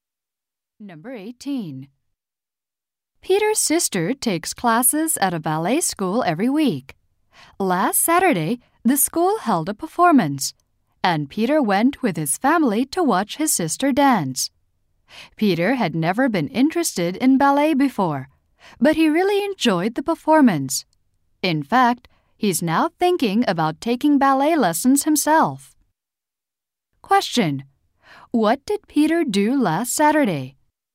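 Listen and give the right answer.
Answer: He watched his sister's ballet performance.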